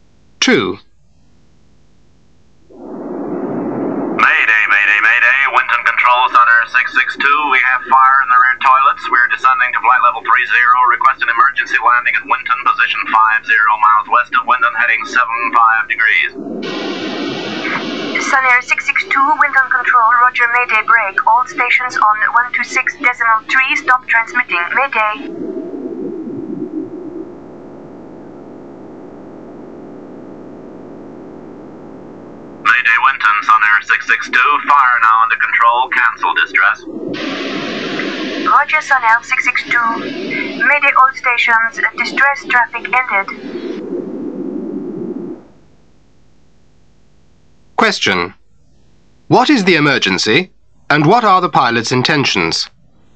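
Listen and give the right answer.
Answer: Fire in the rear toilets; descending to flight level 30 and requesting an emergency landing at Winton.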